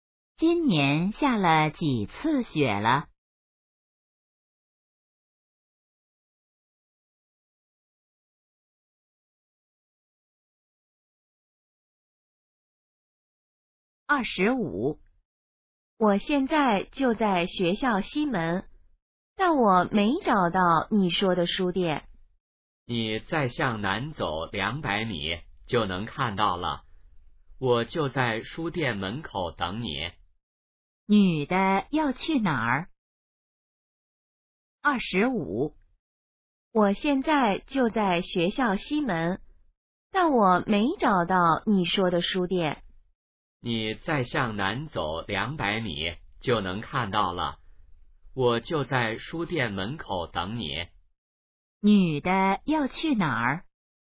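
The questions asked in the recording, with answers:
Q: 女的要去哪儿?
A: 书店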